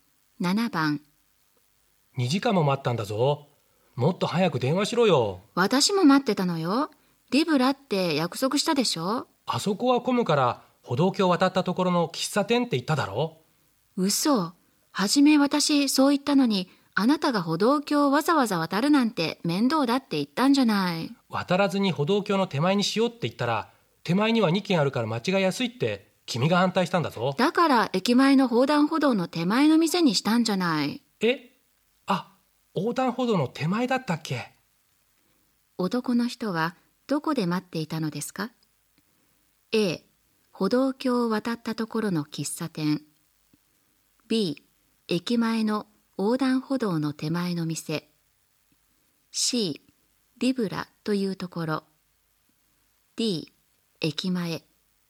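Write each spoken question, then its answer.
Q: 男の人はどこで待っていたのですか A 歩道橋を渡ったところの喫茶店 B 駅前の横断歩道の手前の店 C リブラというところ D 駅前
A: A: 歩道橋を渡ったところの喫茶店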